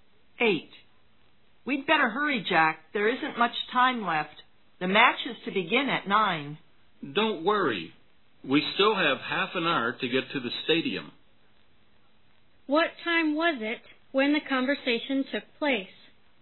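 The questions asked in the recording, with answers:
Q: What time was it when the conversation took place?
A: 8:30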